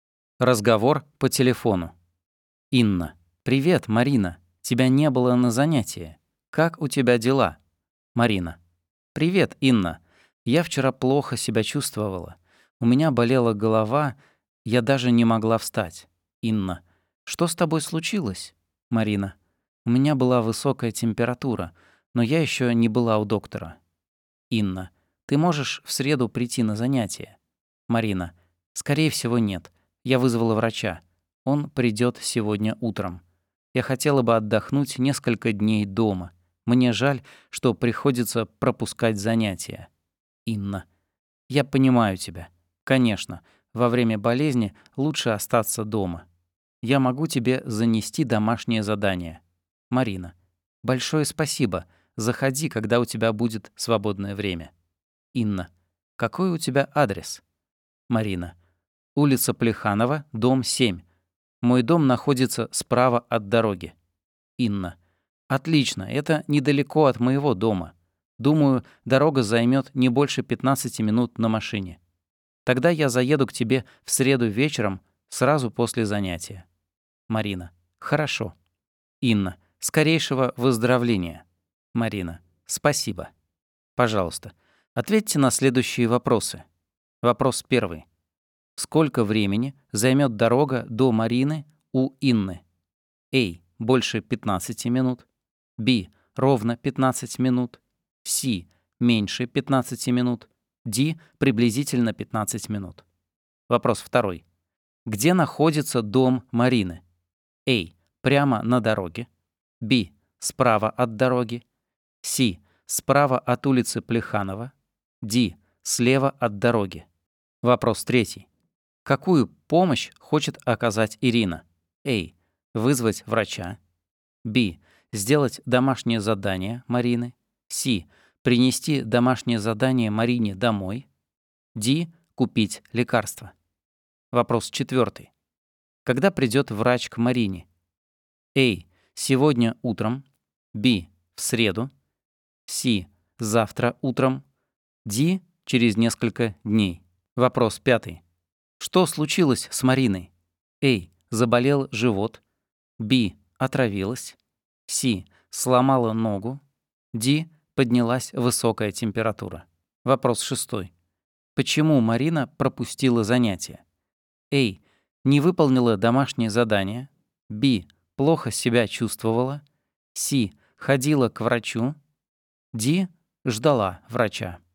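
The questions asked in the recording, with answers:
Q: Где находится дом Марины?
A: Б: Справа от дороги.

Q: Какую помощь хочет оказать Ирина?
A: С: Принести домашнее задание Марине домой.

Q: Когда придет врач к Марине?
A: А: Сегодня утром.

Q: Что случилось с Мариной?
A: Д: Поднялась высокая температура.

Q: Почему Марина пропустила занятие?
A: Б: Плохо себя чувствовала.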